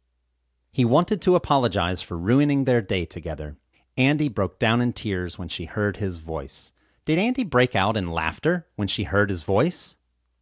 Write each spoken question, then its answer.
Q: Did Andy break out in laughter when she heard his voice?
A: No, Andy didn't break out in laughter when she heard his voice.